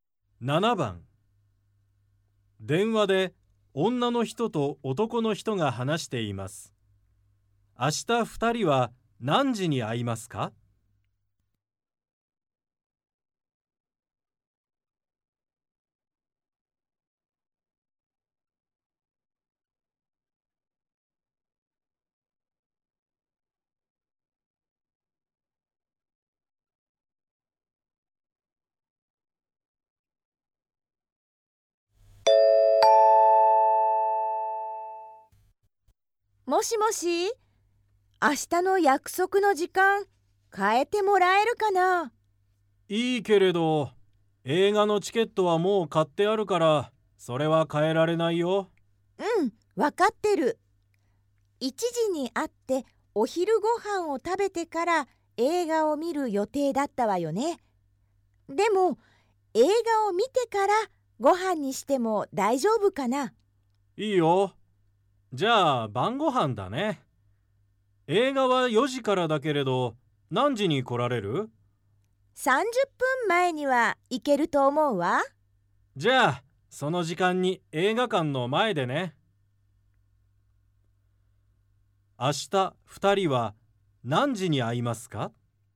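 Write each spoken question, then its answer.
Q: 明日2人は何時に会いますか?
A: 3時半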